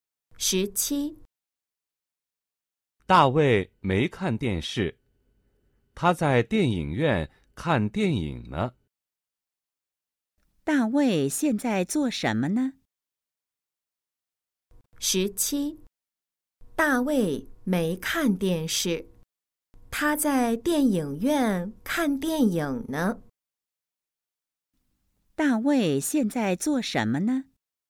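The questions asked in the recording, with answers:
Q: 大卫现在做什么呢?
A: 在电影院看电影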